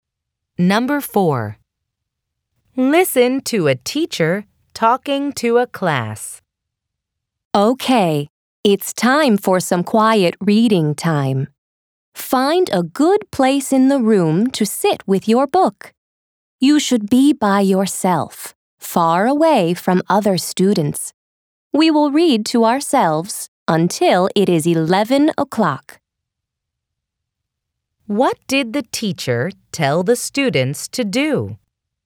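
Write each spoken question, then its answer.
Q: What did the teacher tell the students to do?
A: Find a place to sit alone and read their books quietly until 11 o'clock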